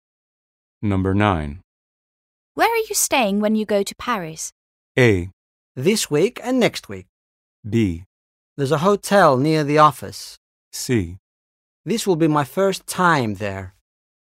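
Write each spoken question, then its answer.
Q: Where are you staying when you go to Paris?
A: B: There's a hotel near the office.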